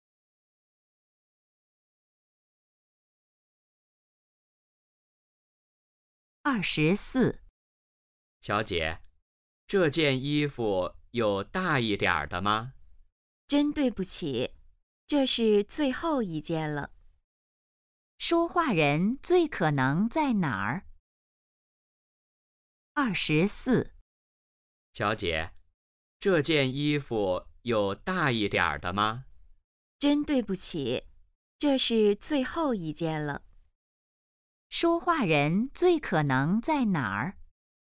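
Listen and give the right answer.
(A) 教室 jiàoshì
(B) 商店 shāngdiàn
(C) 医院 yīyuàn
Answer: (B) 商店 shāngdiàn

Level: HSK2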